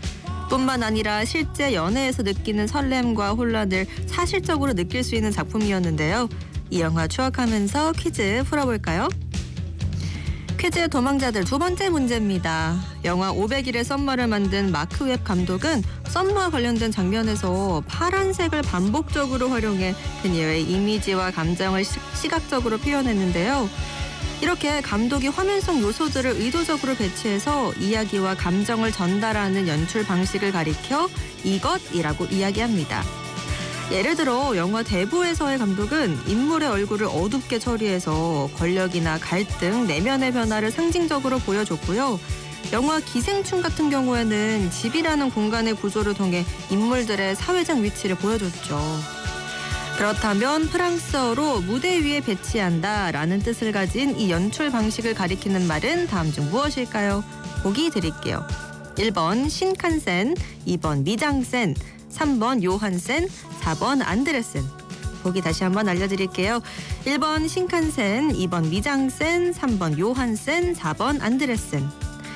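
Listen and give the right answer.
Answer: 2: 미장센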